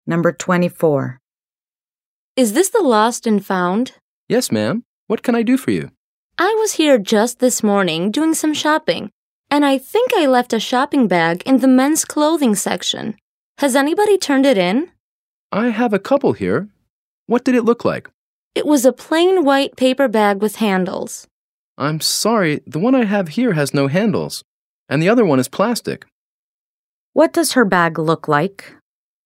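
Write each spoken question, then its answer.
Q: What does her bag look like?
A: A plain white paper bag with handles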